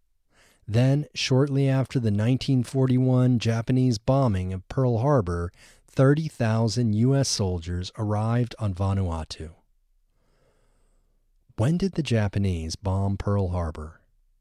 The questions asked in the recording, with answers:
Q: When did the Japanese bomb Pearl Harbor?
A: The Japanese bombed Pearl Harbor in 1941.